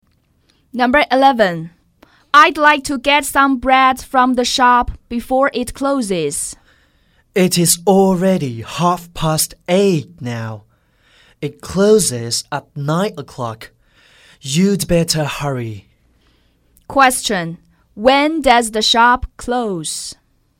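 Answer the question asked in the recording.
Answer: At 9:00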